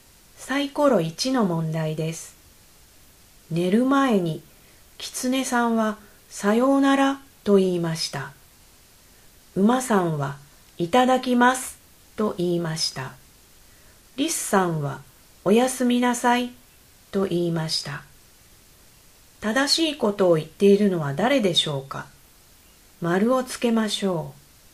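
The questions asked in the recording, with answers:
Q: 正しいことを言っているのは誰でしょうか。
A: リスさん(おやすみなさい)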